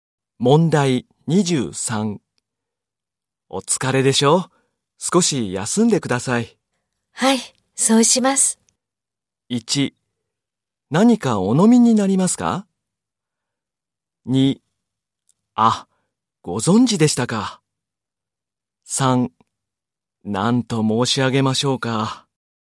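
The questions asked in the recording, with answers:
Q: お疲れでしょ?少し休んでください。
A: 3: 何かお飲みになりますか?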